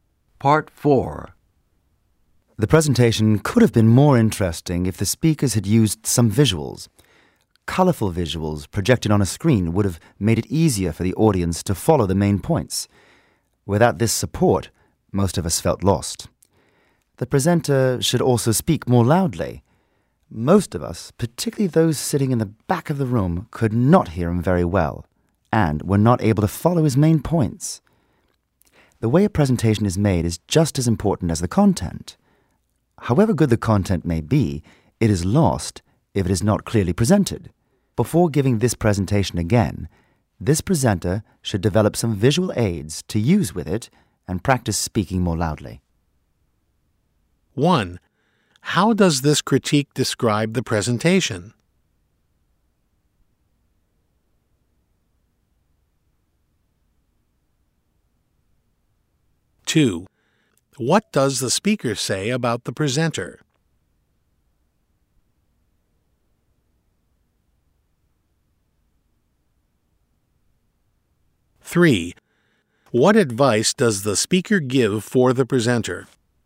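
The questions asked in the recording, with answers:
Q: How does this critique describe the presentation?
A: Hard to follow; it needed visuals

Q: What does the speaker say about the presenter?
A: He didn't speak loudly enough

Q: What advice does the speaker give for the presenter?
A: Develop visual aids and practice speaking more loudly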